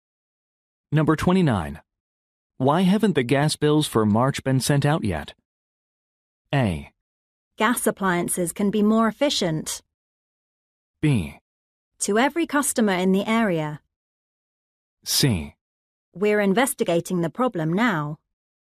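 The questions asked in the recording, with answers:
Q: Why haven't the gas bills for March been sent out yet?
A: C: We're investigating the problem now.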